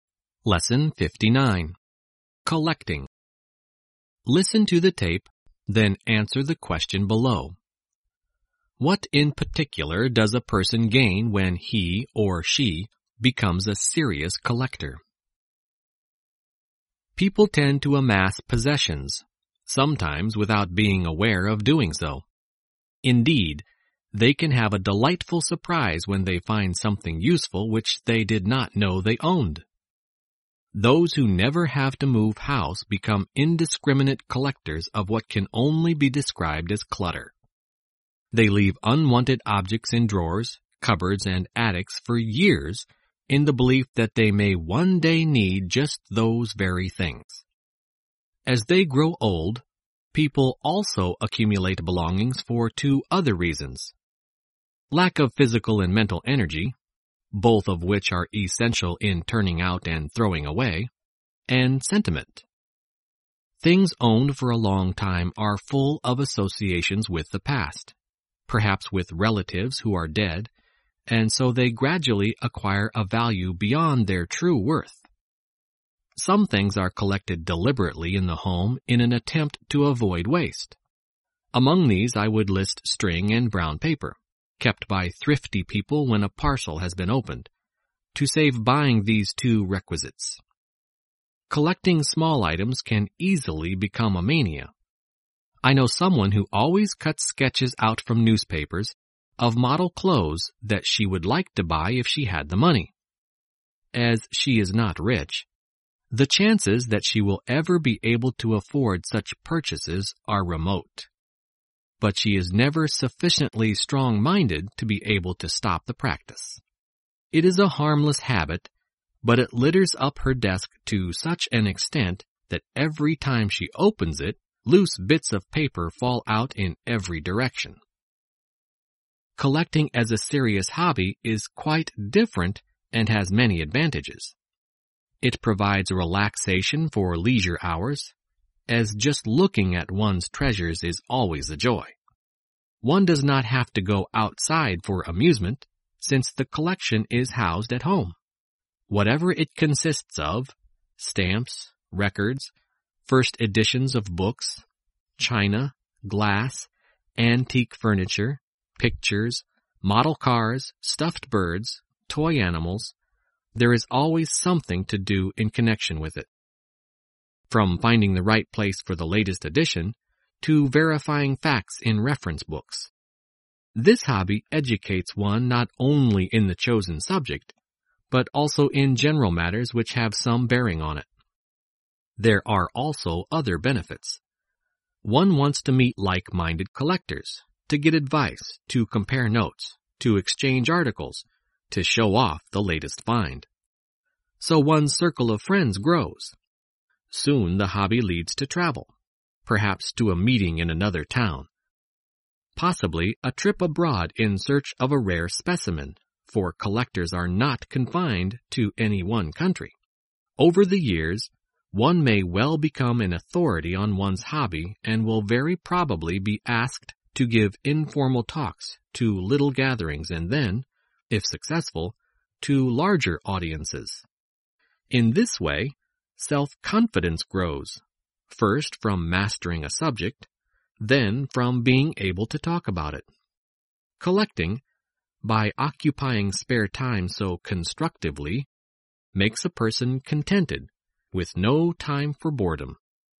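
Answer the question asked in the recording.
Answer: Self-confidence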